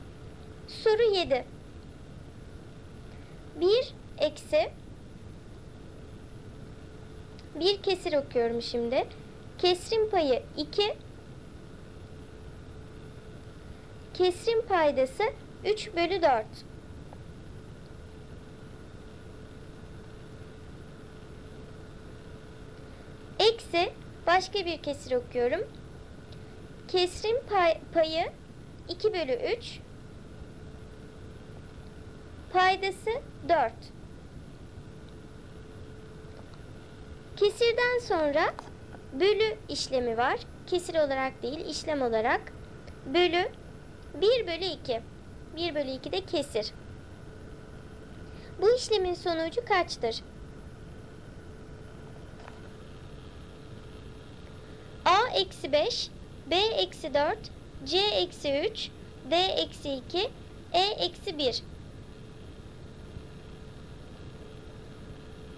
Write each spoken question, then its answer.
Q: Bu işlemin sonucu kaçtır?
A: Doğru cevap D eksi 2.